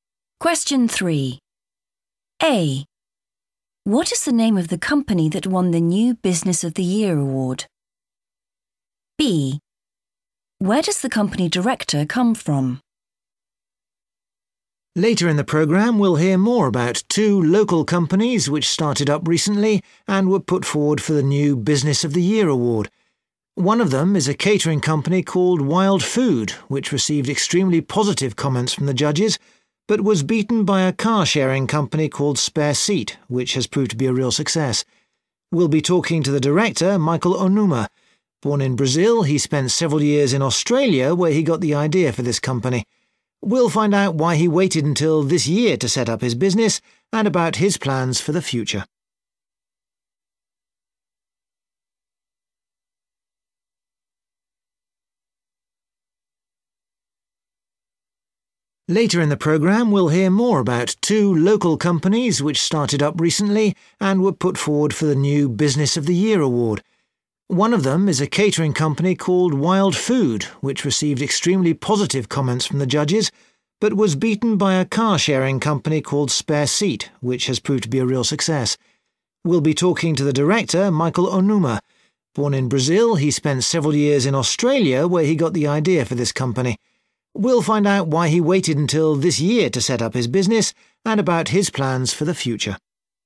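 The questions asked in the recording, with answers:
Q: What is the name of the company that won the new Business of the Year award?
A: Spare Seat

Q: Where does the company director come from?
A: Brazil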